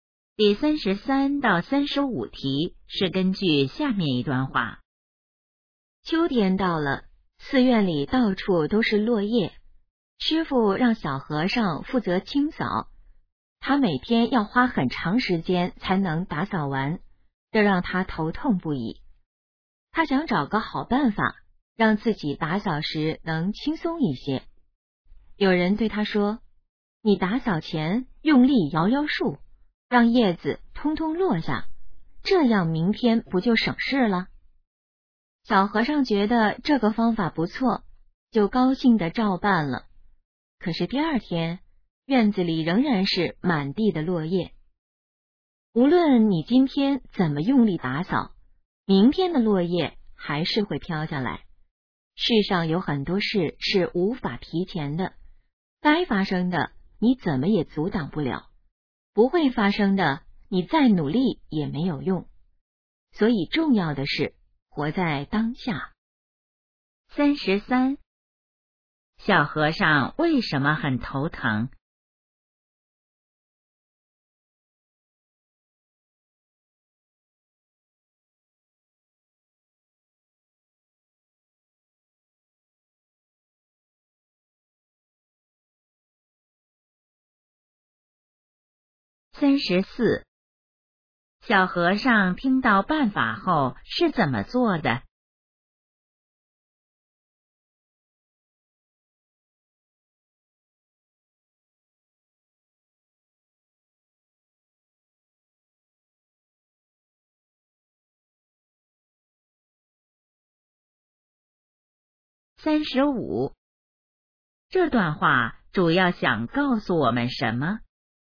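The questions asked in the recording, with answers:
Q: 小和尚为什么很头疼?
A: 每天扫落叶要花很长时间

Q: 小和尚听到办法后是怎么做的?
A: 用力摇树让叶子落下

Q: 这段话主要想告诉我们什么?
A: 要活在当下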